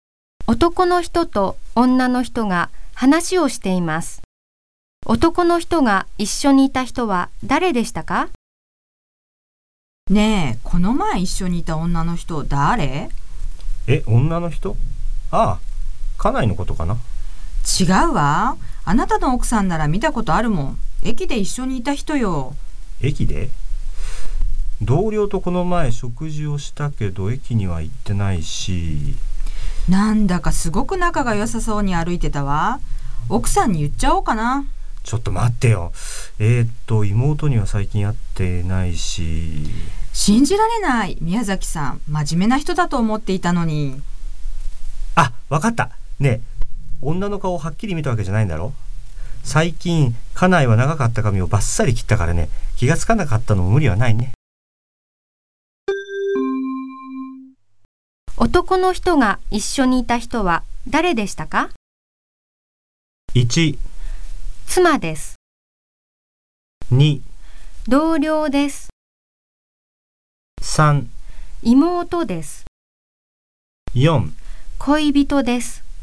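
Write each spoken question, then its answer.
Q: 男の人が一緒にいた人は誰でしたか?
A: 1: 妻です。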